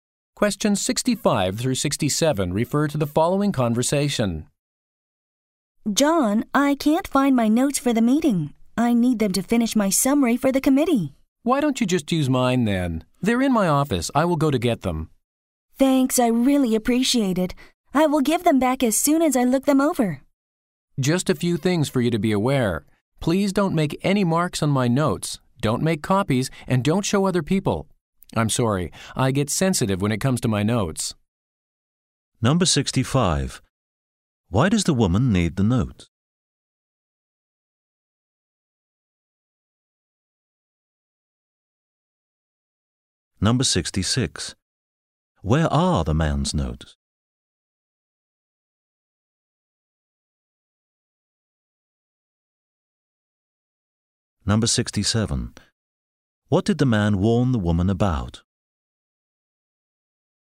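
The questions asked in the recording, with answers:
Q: Why does the woman need the notes?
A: To finish her summary for the committee

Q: Where are the man's notes?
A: In his office

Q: What did the man warn the woman about?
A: Not to mark, copy or show his notes to others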